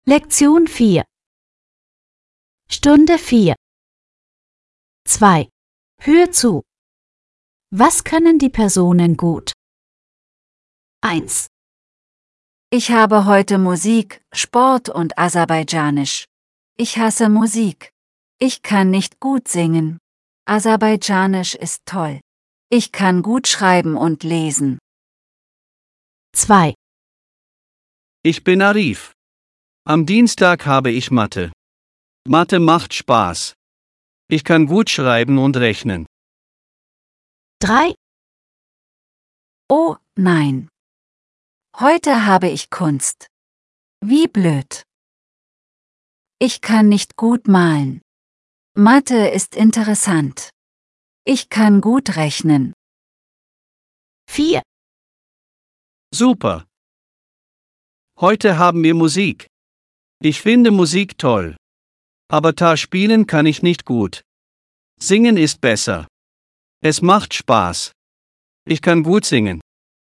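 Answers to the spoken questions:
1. gut schreiben und lesen
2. gut schreiben und rechnen
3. gut rechnen
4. gut singen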